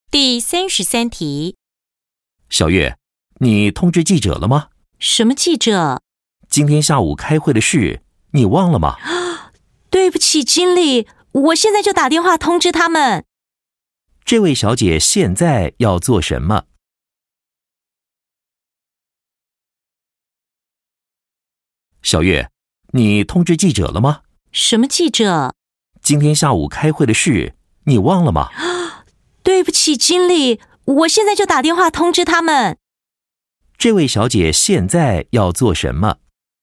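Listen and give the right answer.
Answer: 打电话通知记者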